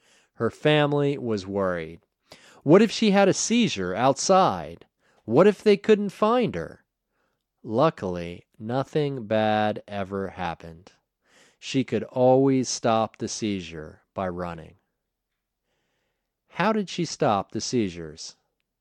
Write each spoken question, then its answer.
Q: How did she stop the seizures?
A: She stopped the seizures by running.